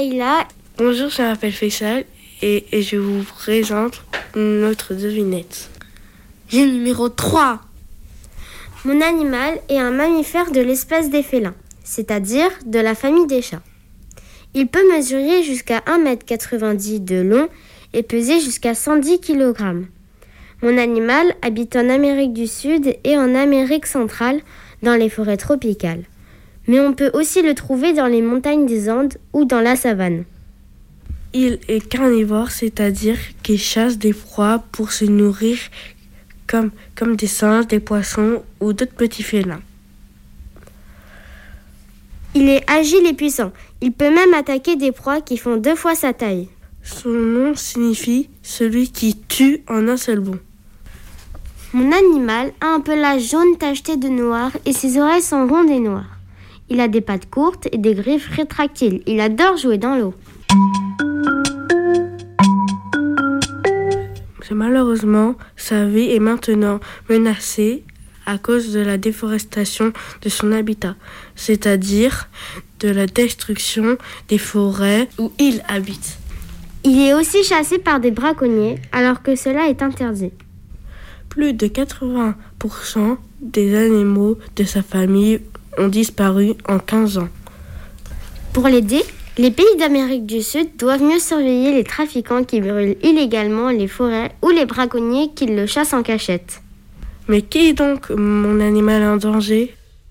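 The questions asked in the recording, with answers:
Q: Mais qui est donc mon animal en danger ?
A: le jaguar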